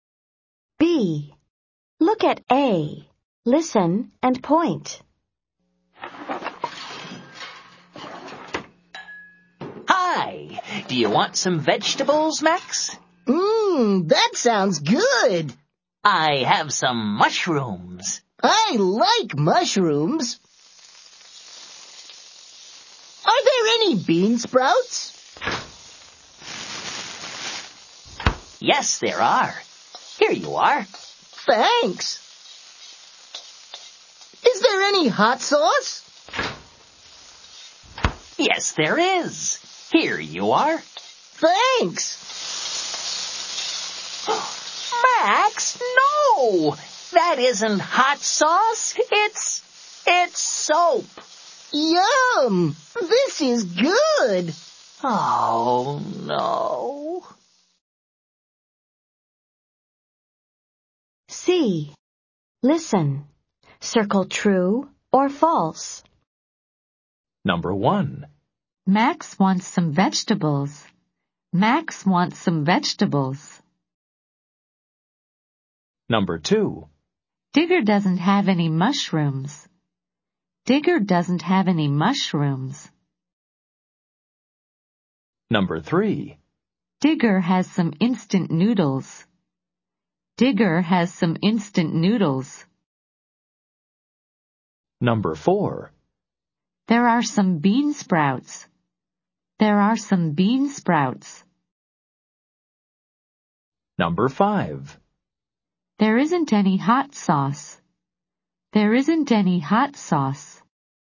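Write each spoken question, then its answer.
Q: Max wants some vegetables.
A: True

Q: Digger doesn't have any mushrooms.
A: False

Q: There are some bean sprouts.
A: True

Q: There isn't any hot sauce.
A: False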